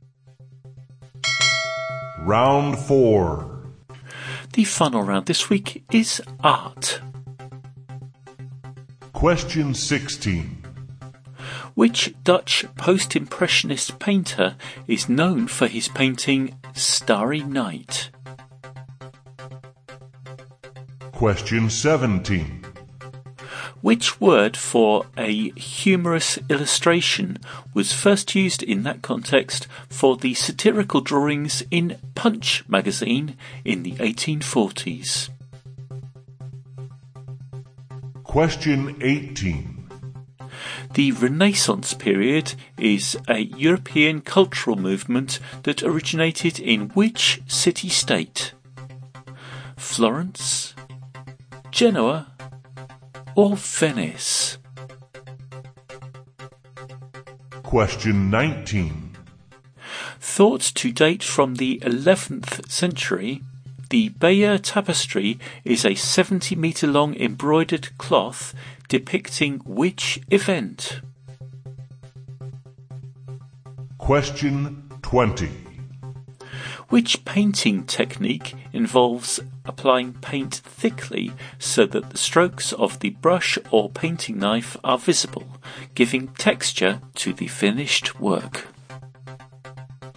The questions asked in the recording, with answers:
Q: Which Dutch post-impressionist painter is known for his painting Starry Night?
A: the painter of Starry Night, was Vincent van Gogh, or Van Gogh, however you prefer to say it.

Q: Which word for a humorous illustration was first used in that context for the satirical drawings in Punch magazine in the 1840s?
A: Number 17, the word for humorous illustration, first used to refer to the drawings in Punch magazine, is cartoon.

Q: Florence? Genoa? Or Venice?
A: Number 18, the Renaissance period originated in Florence.

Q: Thought to date from the 11th century, the Bayeux Tapestry is a 70-meter-long embroidered cloth depicting which event?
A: Number 19, the Bayeux tapestry depicts the Norman invasion of England.

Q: Which painting technique involves applying paint thickly so that the strokes of the brush or painting knife are visible, giving texture to the finished work?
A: And number 20, that painting technique with the thickly applied paint is impasto.